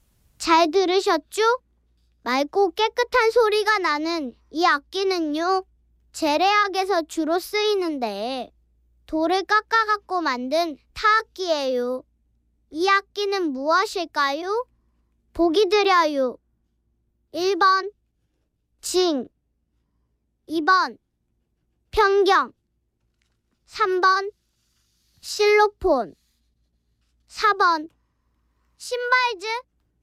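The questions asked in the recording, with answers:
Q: 이 악기는 무엇일까요?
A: 2: 편경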